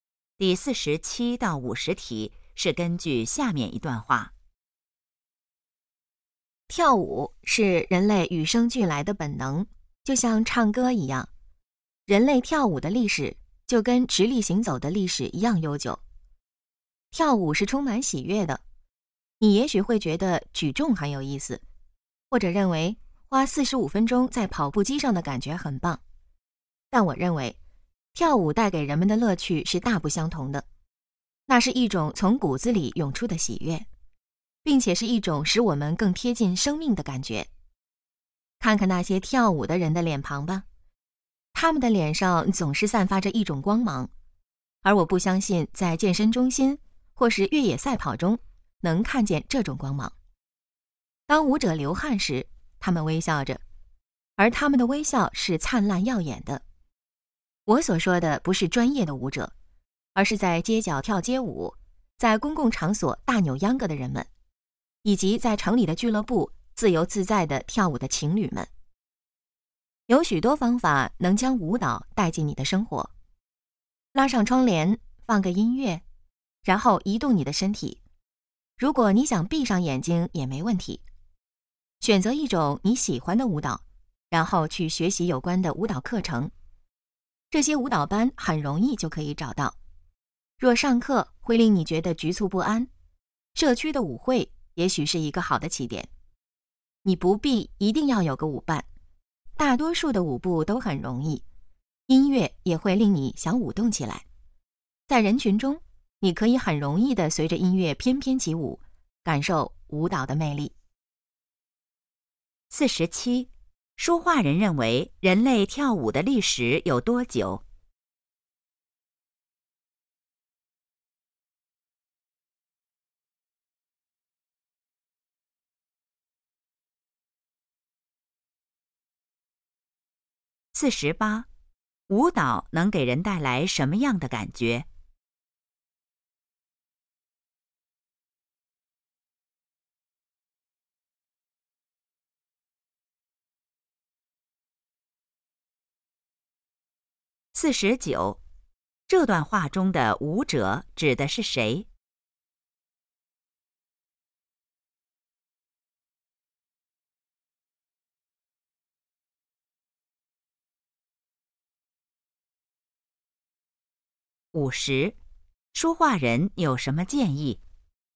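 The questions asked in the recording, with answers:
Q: 说话人认为人类跳舞的历史有多久?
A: 跟直立行走的历史一样悠久

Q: 舞蹈能给人带来什么样的感觉?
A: 喜悦,更贴近生命的感觉

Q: 这段话中的舞者指的是谁?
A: 普通人,不是专业舞者

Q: 说话人有什么建议?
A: 把舞蹈带进生活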